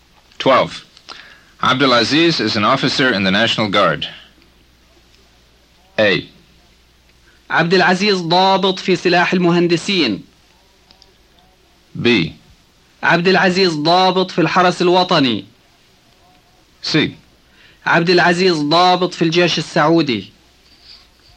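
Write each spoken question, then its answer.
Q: Abdulaziz is an officer in the National Guard.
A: B: عبدالعزيز ضابط في الحرس الوطني.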